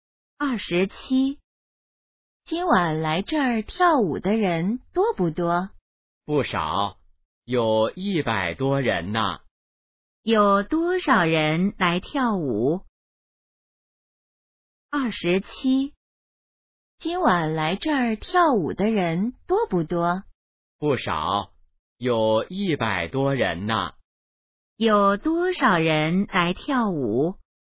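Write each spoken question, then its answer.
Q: 有多少人来跳舞?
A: 100多人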